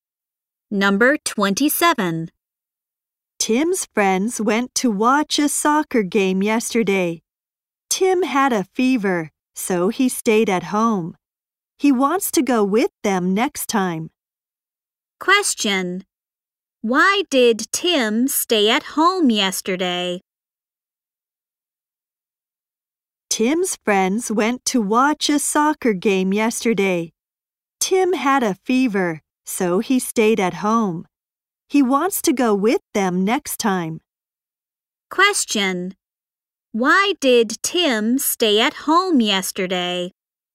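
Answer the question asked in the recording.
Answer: He had a fever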